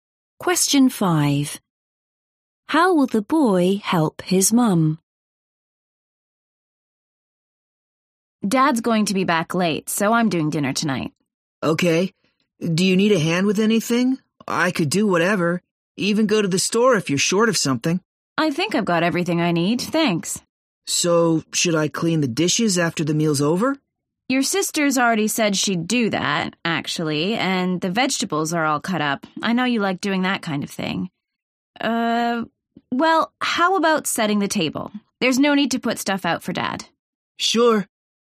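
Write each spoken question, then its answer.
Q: How will the boy help his mum?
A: By setting the table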